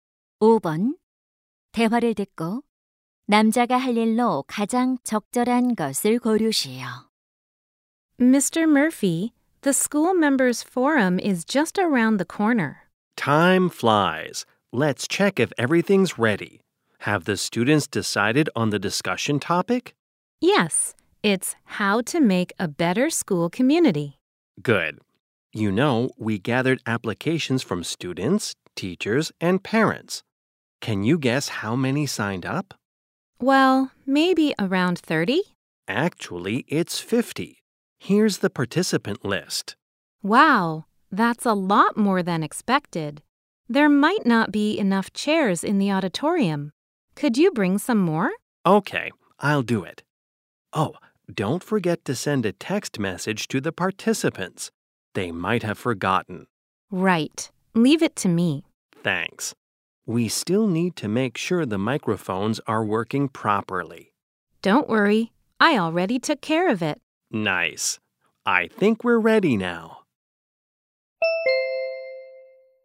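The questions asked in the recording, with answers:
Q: 대화를 듣고 남자가 할 일로 가장 적절한 것을 고르시오.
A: 강당에 의자 더 가져오기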